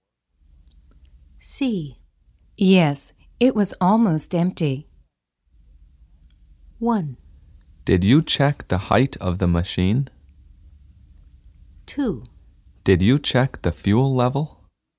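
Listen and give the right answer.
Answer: 2: Did you check the fuel level?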